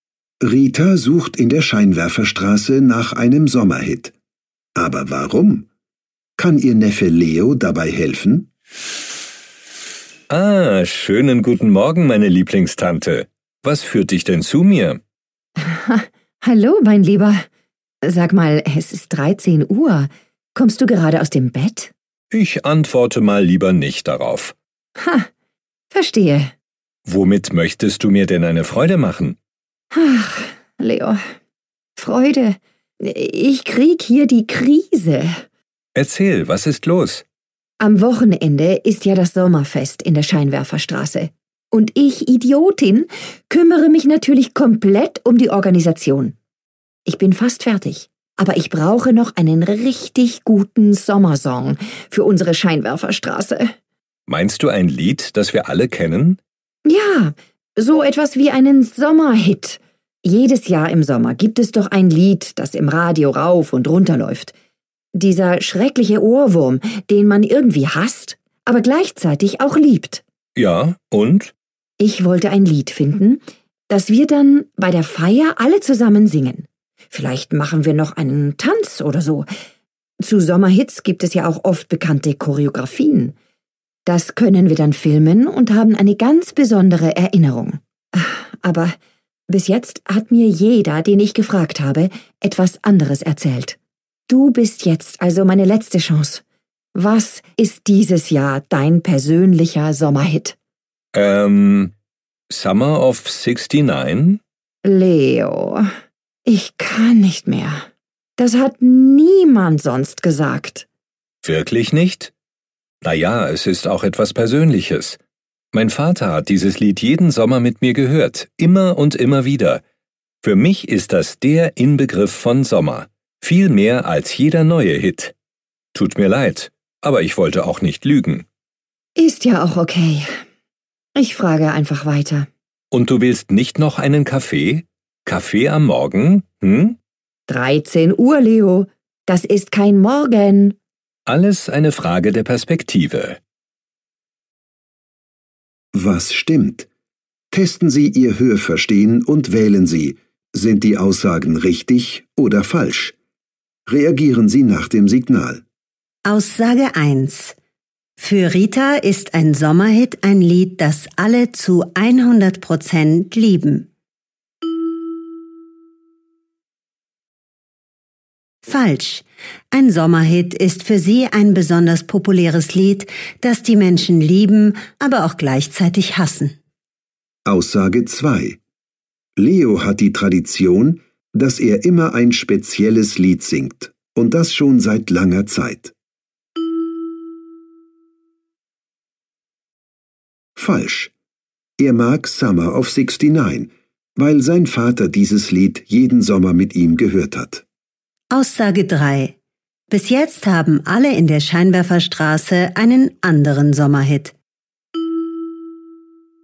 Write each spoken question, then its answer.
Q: Für Rita ist ein Sommerhit ein Lied, das alle zu 100% lieben.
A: Falsch. Ein Sommerhit ist für sie ein besonders populäres Lied, das die Menschen lieben, aber auch gleichzeitig hassen.

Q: Bis jetzt haben alle in der Scheinwerferstraße einen anderen Sommerhit.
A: Richtig, auch Leo nennt einen ganz persönlichen Sommerhit.